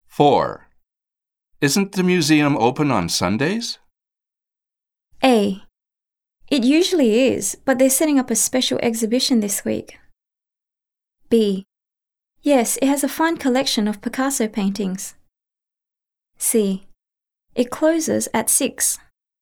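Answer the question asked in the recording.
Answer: A: It usually is, but they're setting up a special exhibition this week.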